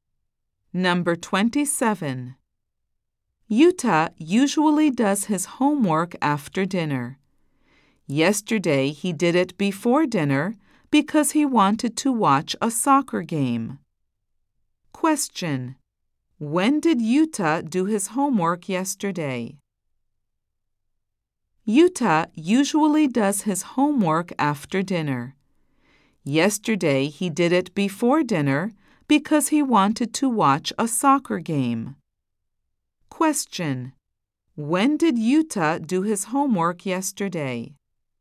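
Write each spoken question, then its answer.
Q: When did Yuta do his homework yesterday?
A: Before dinner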